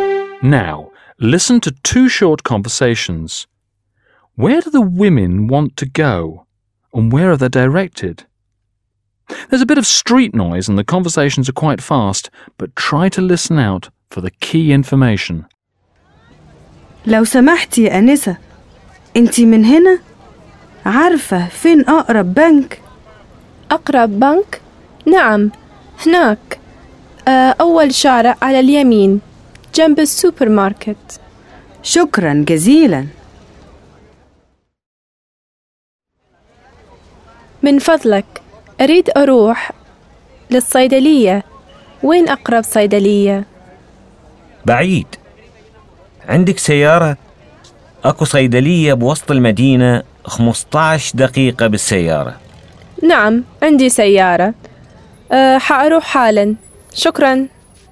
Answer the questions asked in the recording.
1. You probably heard that the first woman wanted to go to the nearest bank.
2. The first street on the right.